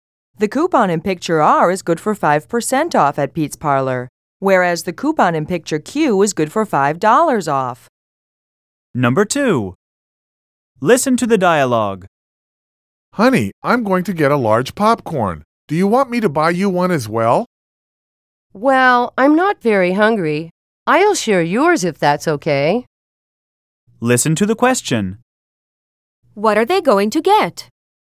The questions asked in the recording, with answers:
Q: What are they going to get?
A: The man is going to get one large popcorn, which the woman is going to share with him.